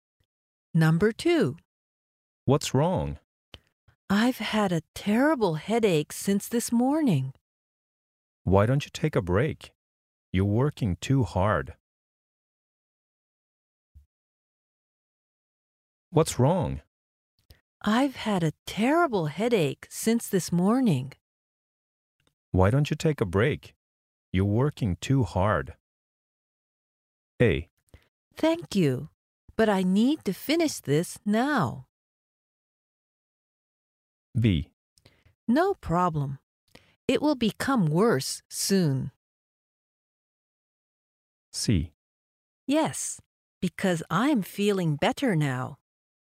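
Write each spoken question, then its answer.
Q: Why don't you take a break?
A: A: Thank you, but I need to finish this now.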